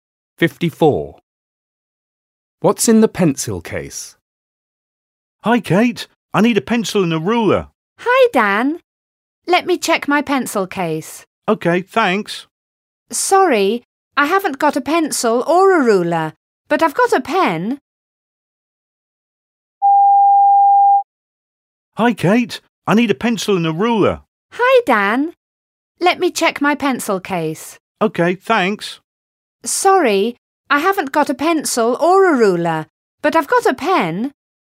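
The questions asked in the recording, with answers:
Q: What's in the pencil case?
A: A pen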